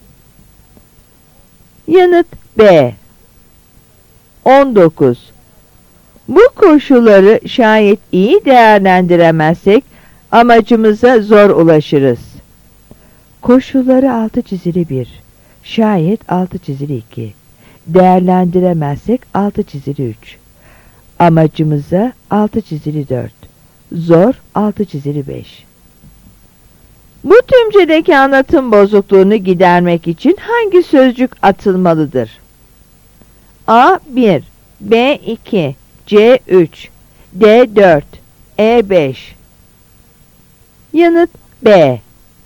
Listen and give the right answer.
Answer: Yanıt B.